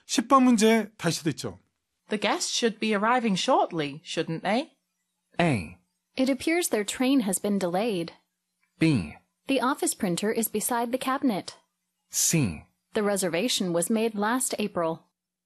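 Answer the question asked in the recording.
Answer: A: It appears their train has been delayed.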